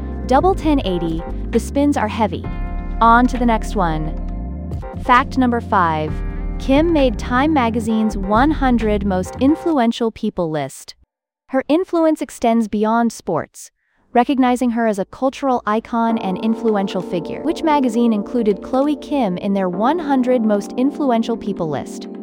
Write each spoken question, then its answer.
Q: Which magazine included Chloe Kim in their 100 Most Influential People list?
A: Correct answer, Time.